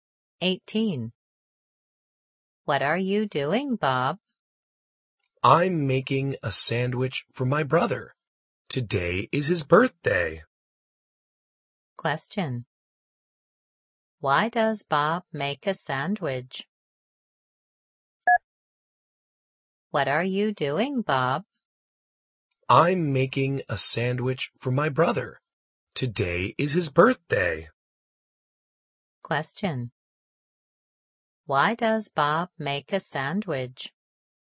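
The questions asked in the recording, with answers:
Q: Why does Bob make a sandwich?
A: It's his brother's birthday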